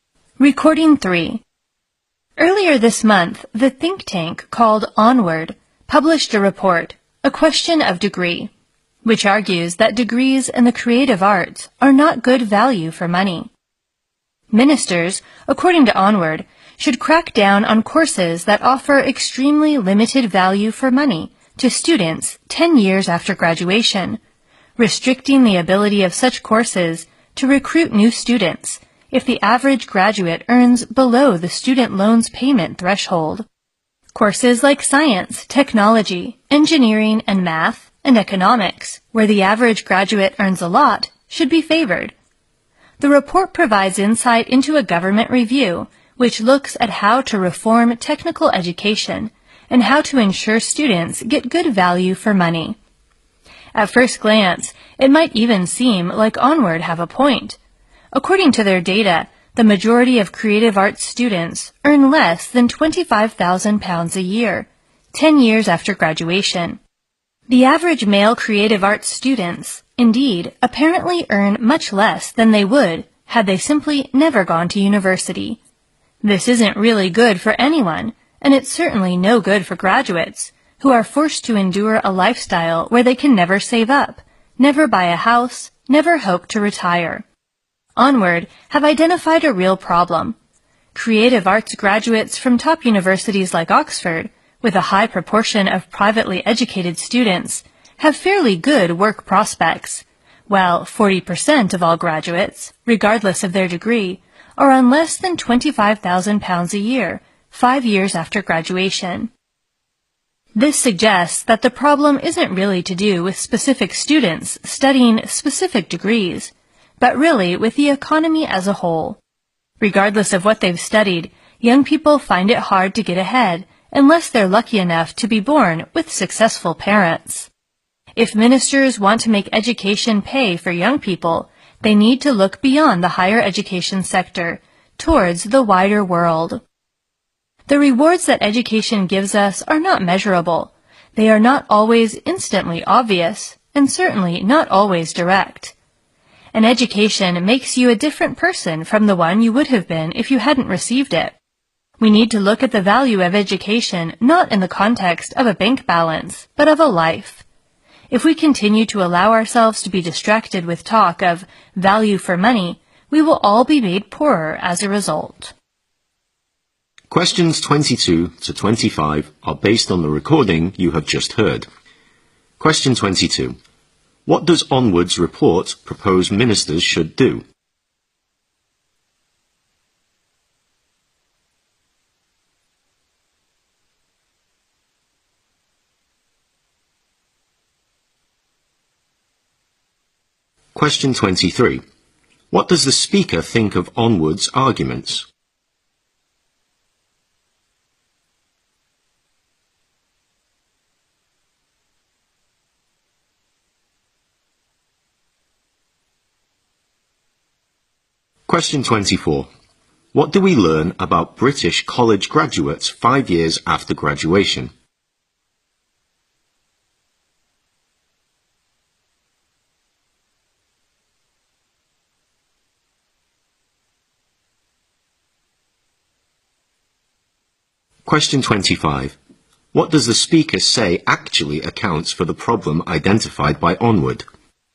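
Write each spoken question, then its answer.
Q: What does Onward's report propose ministers should do?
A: Crack down on courses that offer very limited value for money.

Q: What do we learn about British college graduates 5 years after graduation?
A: 40% earn less than £25,000 a year.

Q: What does the speaker say actually accounts for the problem identified by Onward?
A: The economy as a whole.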